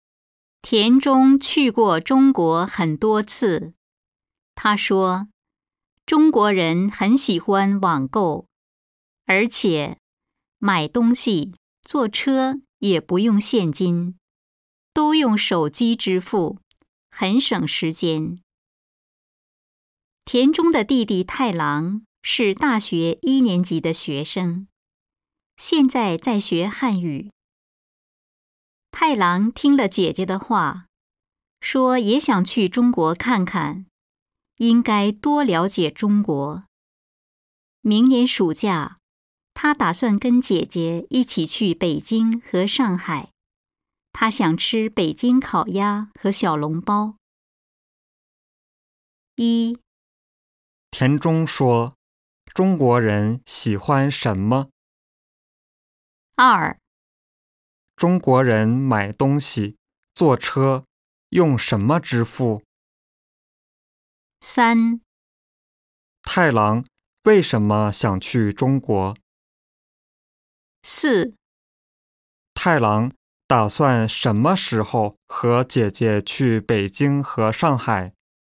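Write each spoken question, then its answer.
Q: 田中说,中国人喜欢什么?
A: 网购

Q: 中国人买东西、坐车用什么支付?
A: 手机

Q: 太郎为什么想去中国?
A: 听了姐姐的话,想多了解中国

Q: 太郎打算什么时候和姐姐去北京和上海?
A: 明年暑假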